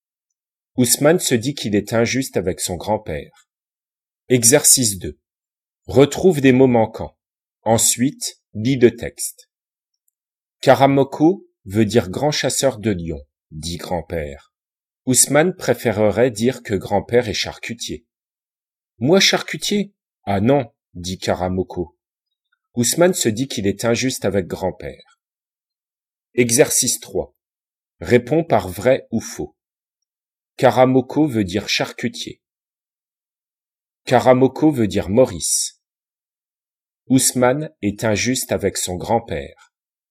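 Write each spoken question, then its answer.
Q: Caramoco veut dire charcutier.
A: faux

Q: Caramoco veut dire Maurice.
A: faux

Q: Ousmane est injuste avec son grand-père.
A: vrai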